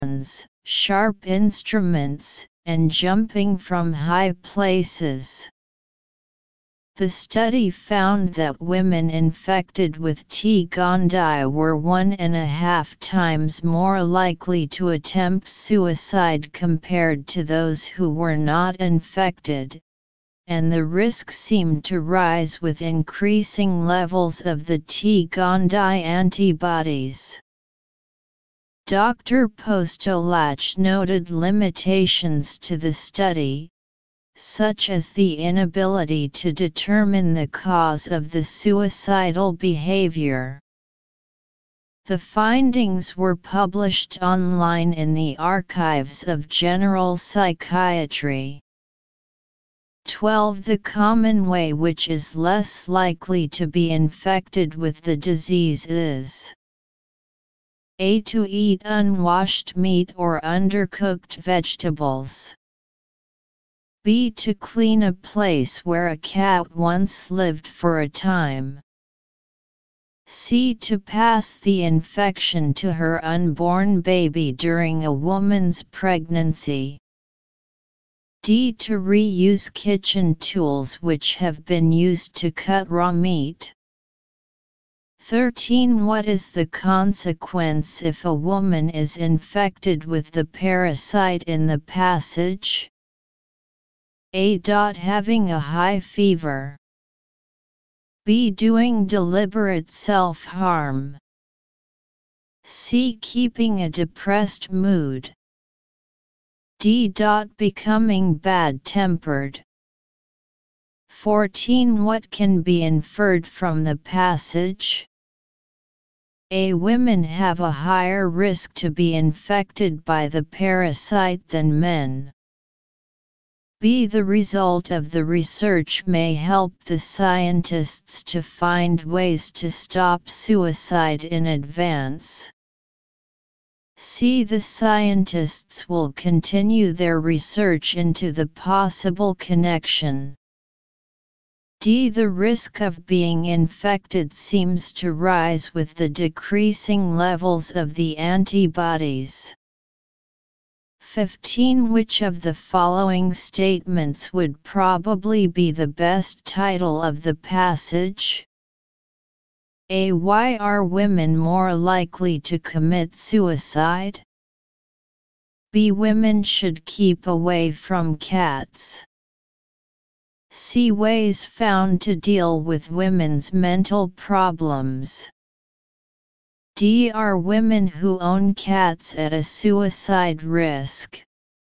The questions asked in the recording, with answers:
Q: What is the consequence if a woman is infected with the parasite in the passage?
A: Therefore B is correct.

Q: Which of the following statements would probably be the best title of the passage?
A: Therefore D is correct.